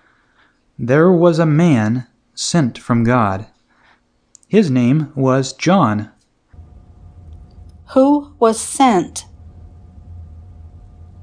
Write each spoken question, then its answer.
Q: Who was sent?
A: A man was sent.